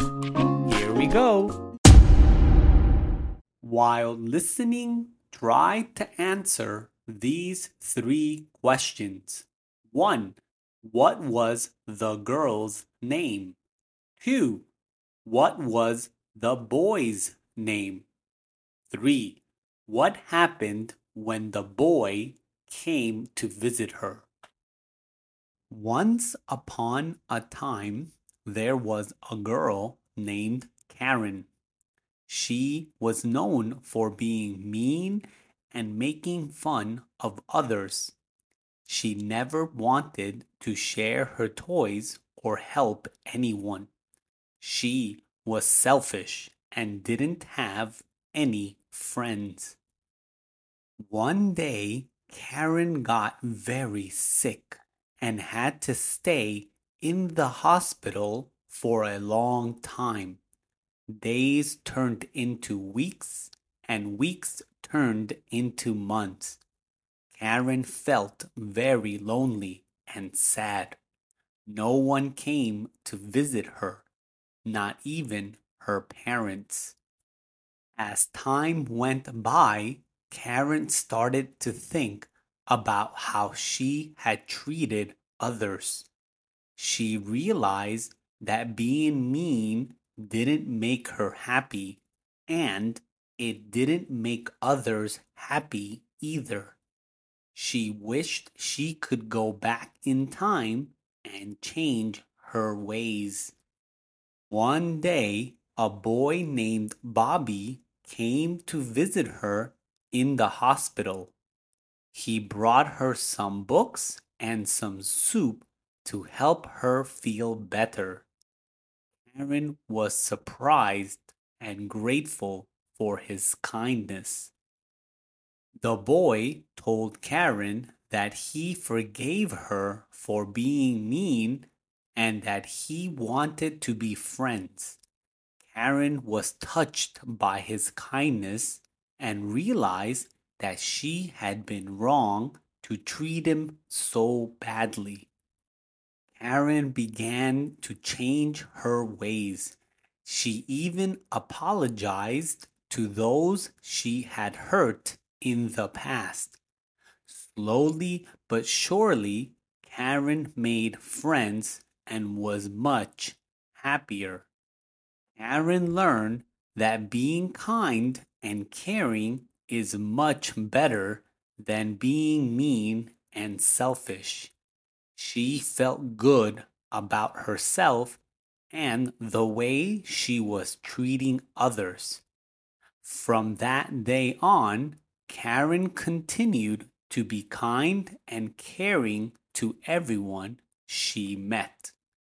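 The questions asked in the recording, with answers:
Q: What was the girl's name?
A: Karen

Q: What was the boy's name?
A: Bobby

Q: What happened when the boy came to visit her?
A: He brought her books and soup, forgave her and wanted to be friends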